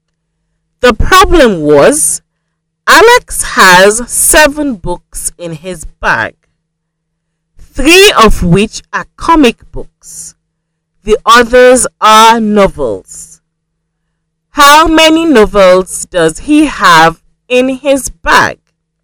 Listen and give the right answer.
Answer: So, there are 4 novels.